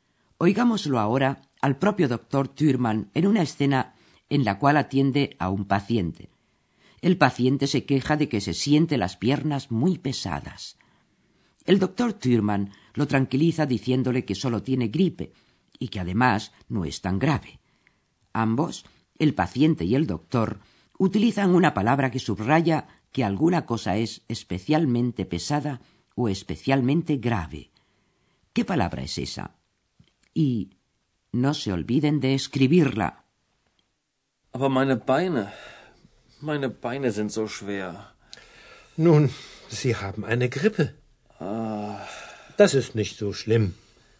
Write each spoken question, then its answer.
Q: ¿Qué palabra es esa?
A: La última palabra a buscar era la palabra so, que significa tan.